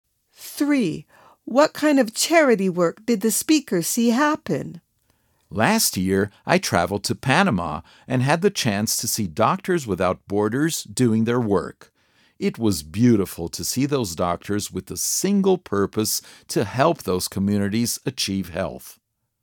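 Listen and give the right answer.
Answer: Doctors Without Borders giving medical help in Panama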